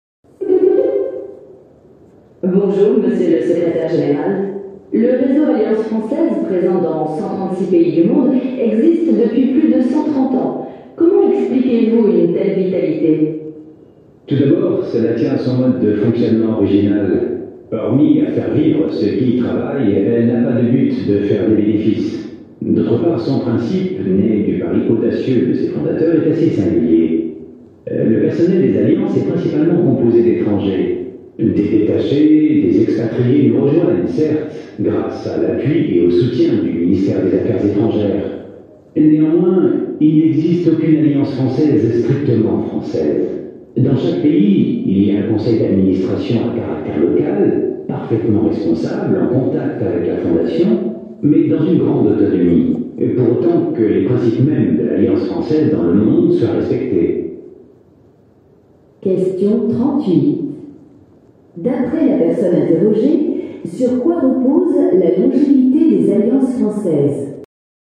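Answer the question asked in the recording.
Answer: Sur leur fonctionnement original: but non lucratif, personnel et gestion locaux et autonomes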